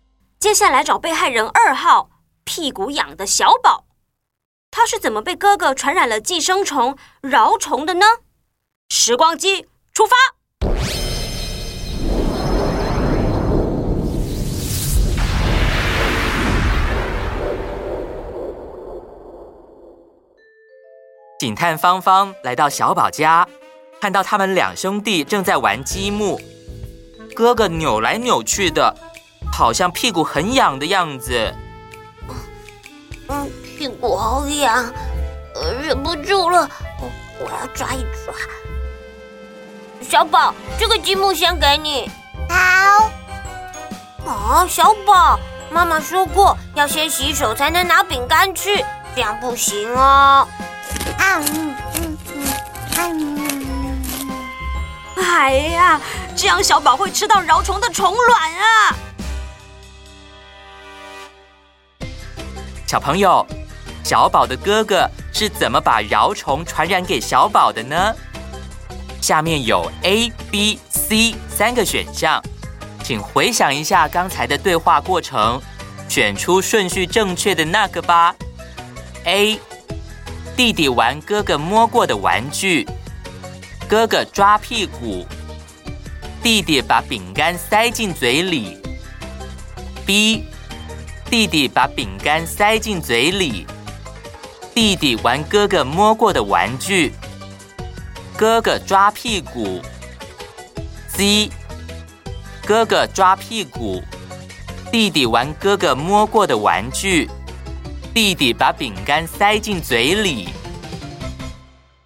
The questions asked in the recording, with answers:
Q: 小朋友,小宝的哥哥是怎么把饶虫传染给小宝的呢?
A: 答案是 C, 你答对了吗?